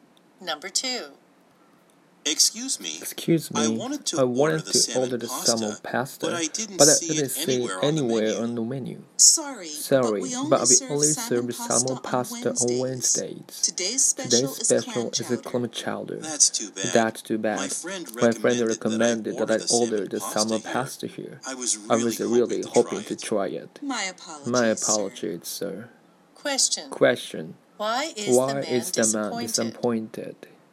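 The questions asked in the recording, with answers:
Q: Why is the man disappointed?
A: The salmon pasta he wanted is not served today (only on Wednesdays).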